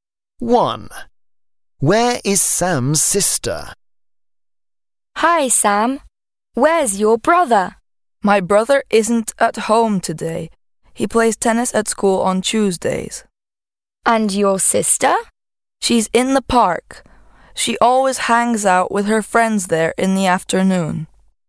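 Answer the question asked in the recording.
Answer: In the park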